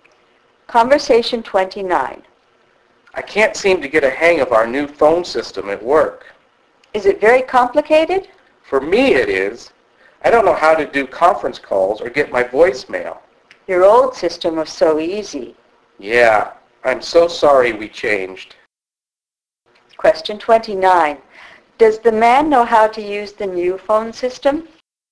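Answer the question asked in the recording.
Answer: No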